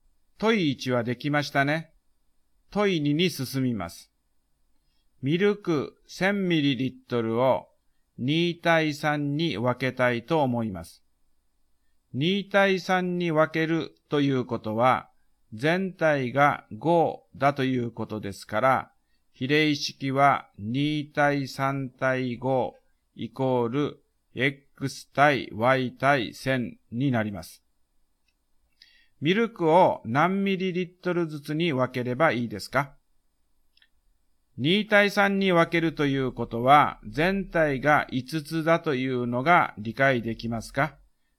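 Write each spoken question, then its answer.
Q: ミルクを何ミリリットルずつに分ければいいですか?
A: 400mlと600ml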